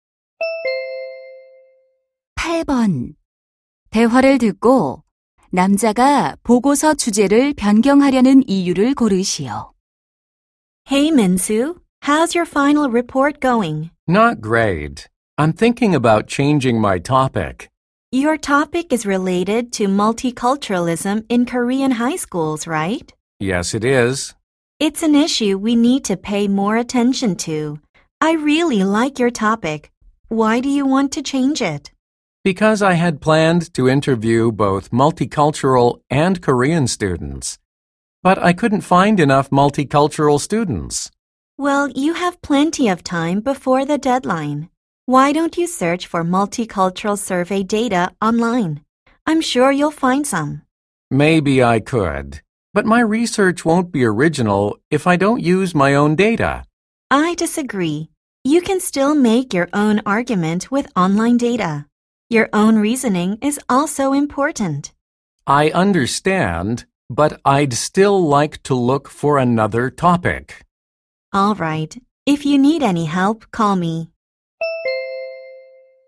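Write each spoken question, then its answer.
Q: 대화를 듣고 남자가 보고서 주제를 변경하려는 이유를 고르시오.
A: 인터뷰할 다문화 학생을 충분히 찾지 못해서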